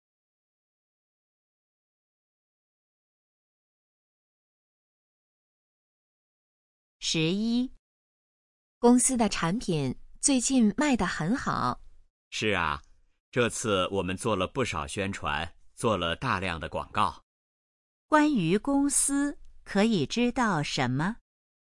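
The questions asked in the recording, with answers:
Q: 关于公司,可以知道什么?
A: 做了大量的广告,产品卖得很好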